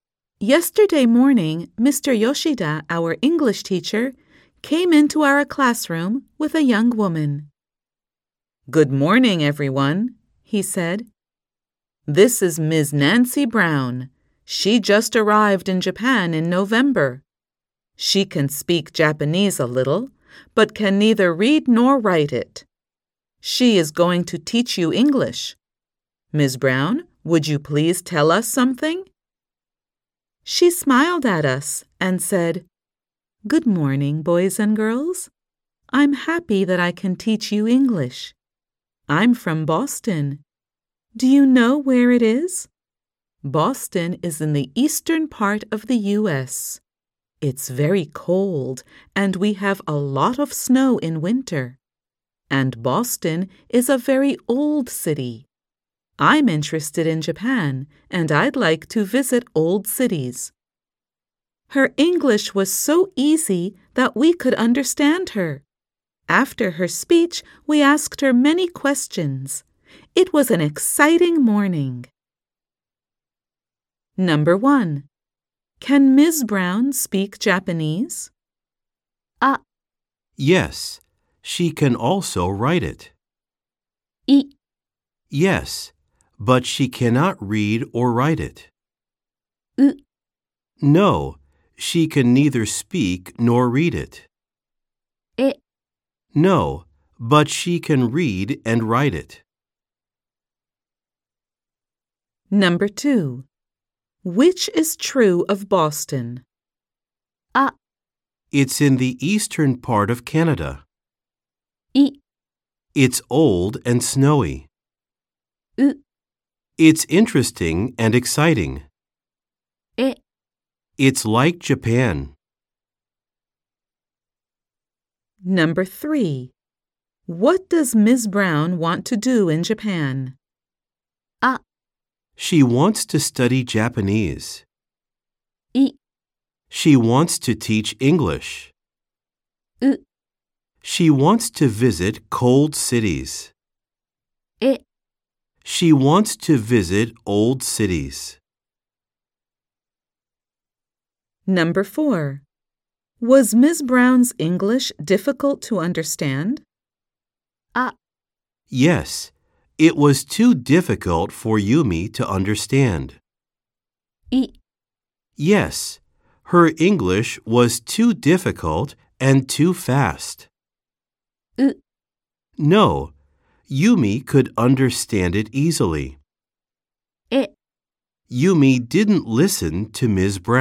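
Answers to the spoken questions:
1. い: Yes. But she cannot read or write it.
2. い: It's old and snowy.
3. え: She wants to visit old cities.
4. う: No. Yumi could understand it easily.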